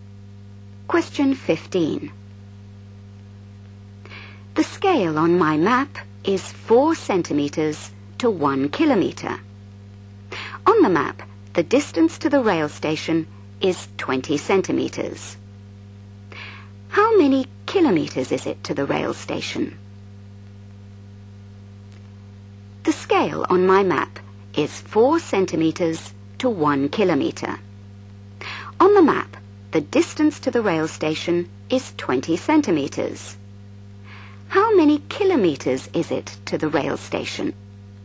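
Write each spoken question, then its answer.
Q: How many kilometers is it to the rail station?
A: 5 km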